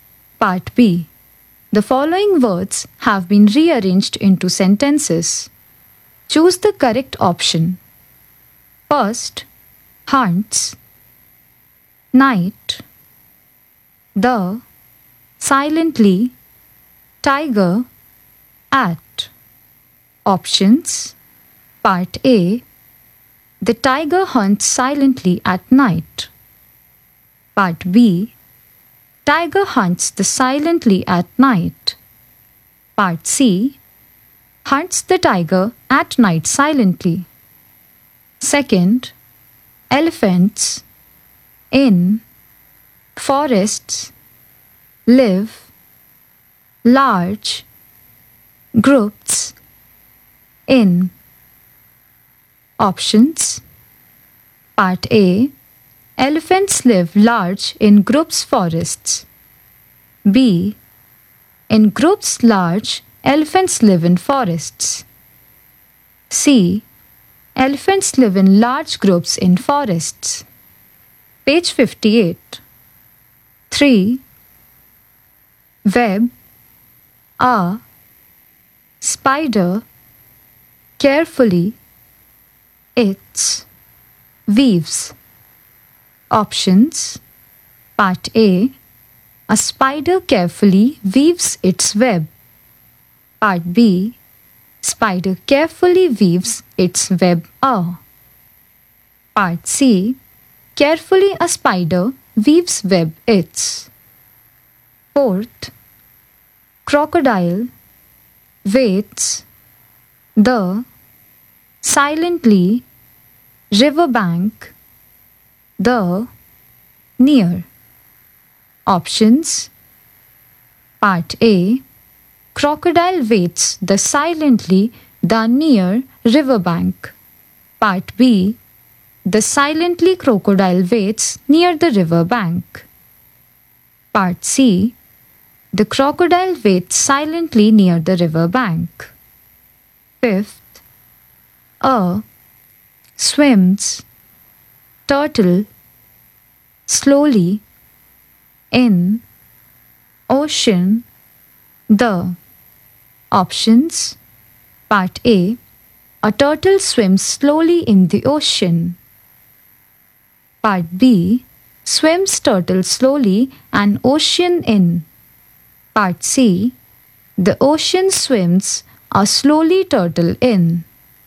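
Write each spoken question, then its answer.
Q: hunts, night, the, silently, tiger, at.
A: A: The tiger hunts silently at night.

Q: elephants, in, forests, live, large, groups, in.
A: C: Elephants live in large groups in forests.

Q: Web, a, spider, carefully, its, weaves.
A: A: A spider carefully weaves its web.

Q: Crocodile waits the silently riverbank the near.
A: C: The crocodile waits silently near the river bank.

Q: A. Swims. Turtle. Slowly. In. Ocean. The.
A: A: A turtle swims slowly in the ocean.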